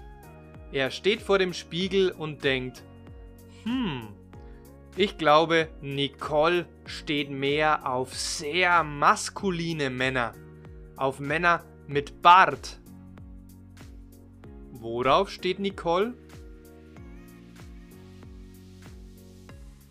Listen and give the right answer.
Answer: Auf sehr maskuline Männer.